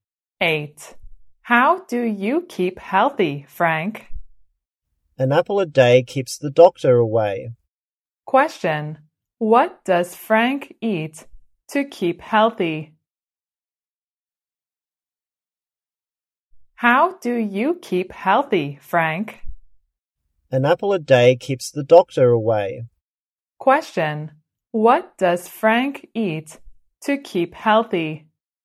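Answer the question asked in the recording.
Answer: An apple a day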